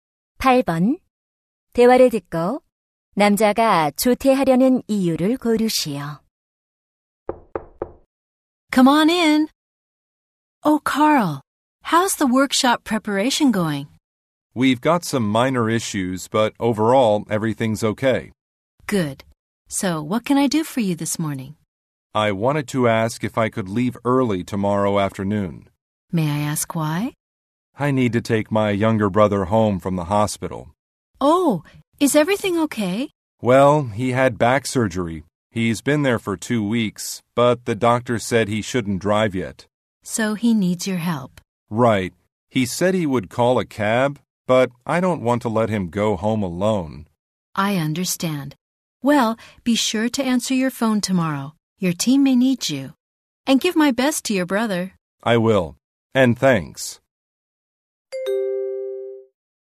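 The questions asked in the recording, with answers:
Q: 대화를 듣고 남자가 조퇴하려는 이유를 고르시오.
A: 퇴원하는 남동생을 집에 데려다주려고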